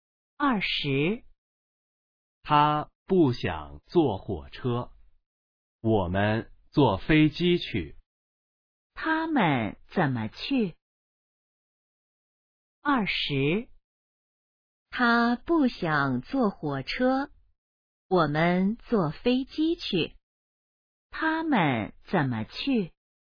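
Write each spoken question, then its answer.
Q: 他们怎么去?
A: 坐飞机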